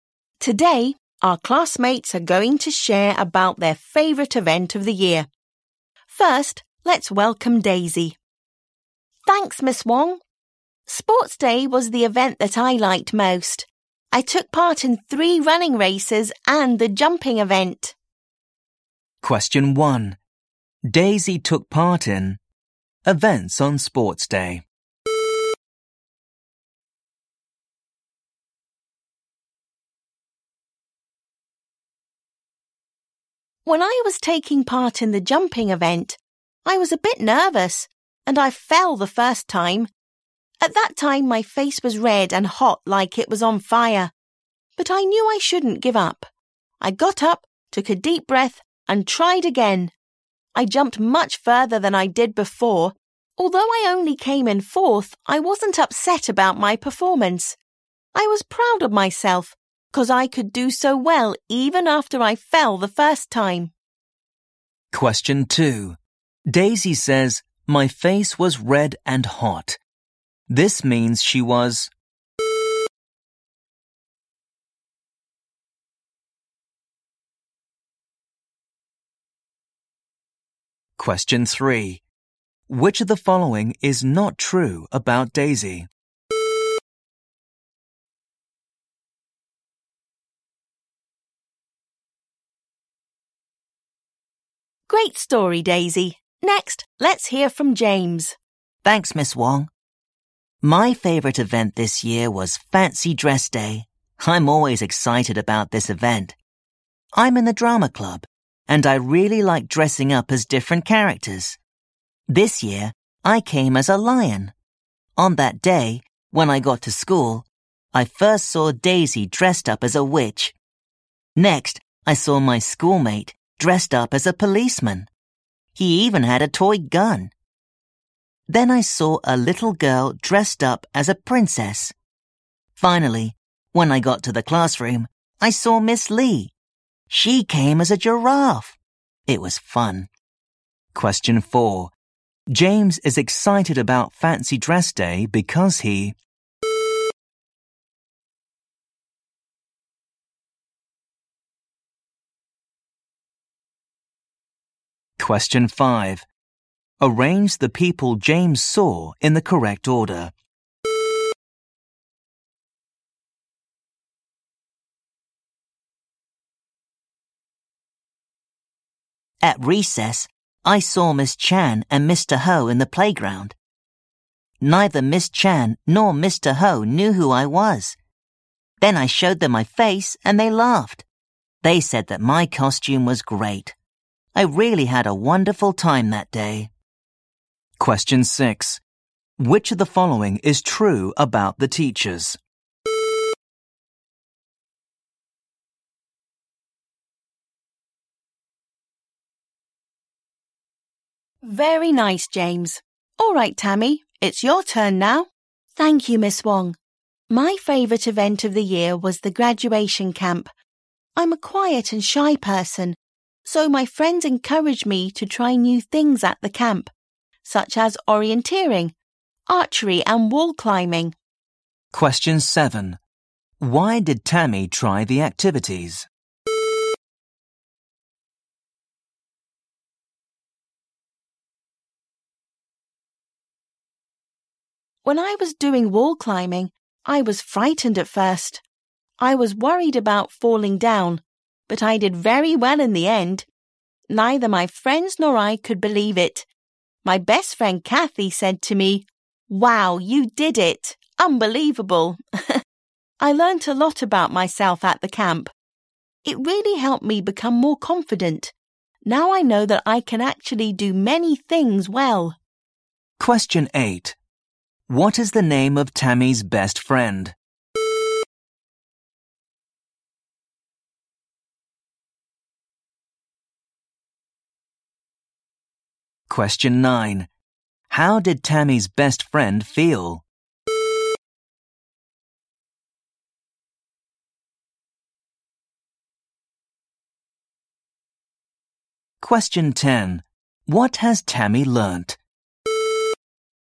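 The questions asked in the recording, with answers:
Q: Daisy took part in events on Sports Day.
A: 4 (three running races and the jumping event)

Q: James is excited about Fancy Dress Day because he...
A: really likes dressing up as different characters

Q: Why did Tammy try the activities?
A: Her friends encouraged her to try new things

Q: What is the name of Tammy's best friend?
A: Kathy

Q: What has Tammy learnt?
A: She can actually do many things well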